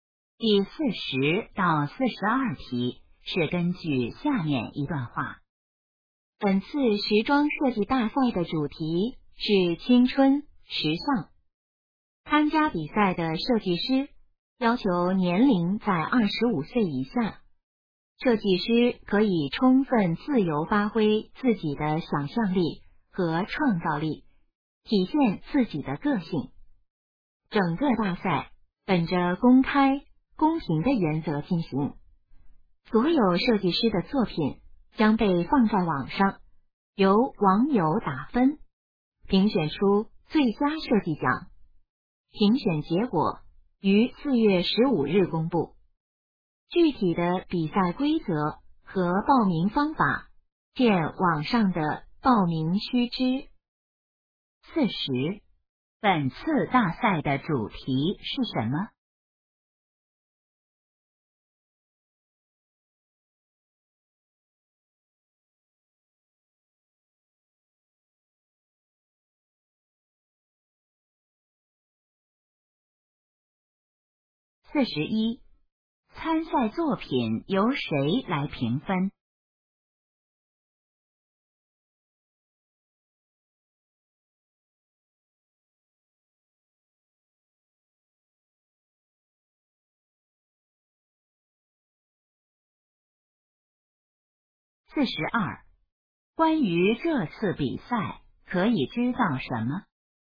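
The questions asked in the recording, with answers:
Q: 本次大赛的主题是什么?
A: 青春时尚

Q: 参赛作品由谁来评分?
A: 网友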